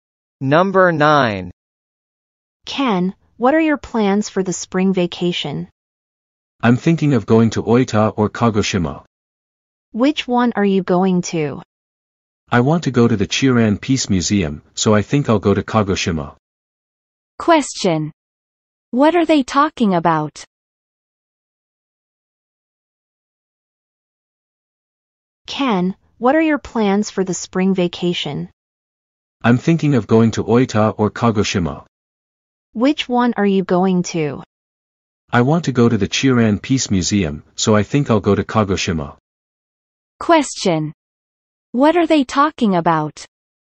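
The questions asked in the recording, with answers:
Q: What are they talking about?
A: Ken's plans for the spring vacation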